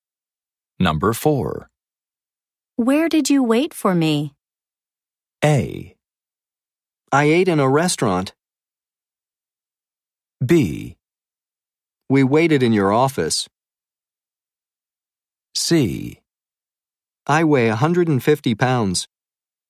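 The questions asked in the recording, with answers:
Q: Where did you wait for me?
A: B: We waited in your office.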